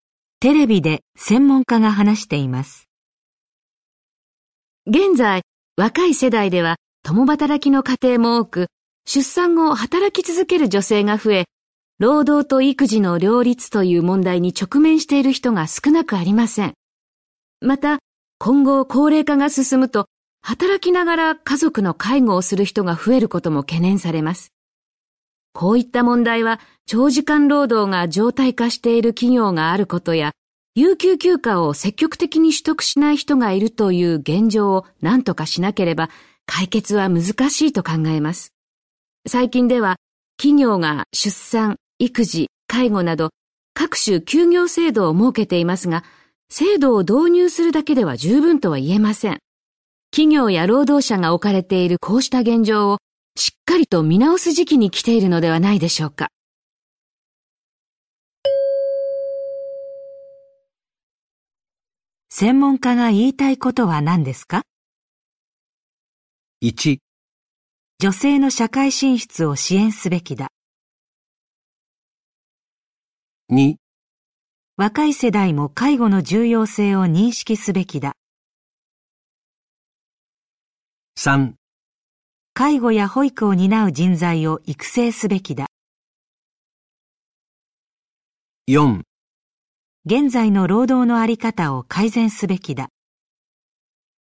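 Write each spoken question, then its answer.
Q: 専門家が言いたいことは何ですか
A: 4: 現在の労働の在り方を改善すべきだ。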